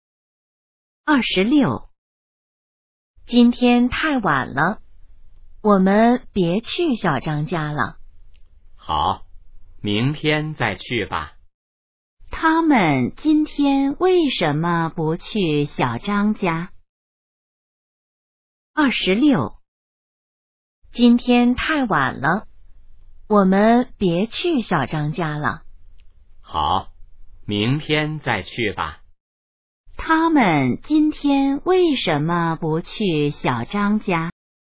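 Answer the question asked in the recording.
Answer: 太晚了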